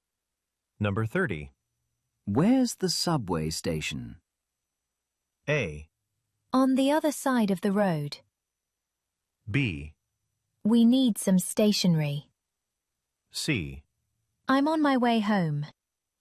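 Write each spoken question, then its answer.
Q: Where's the subway station?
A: A: On the other side of the road.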